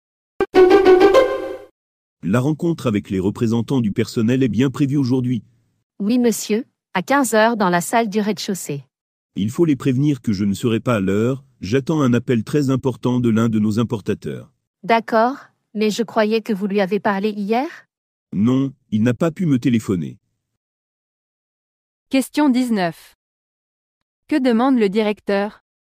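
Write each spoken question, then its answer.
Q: Que demande le directeur ?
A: De prévenir les représentants du personnel qu'il sera en retard à la réunion.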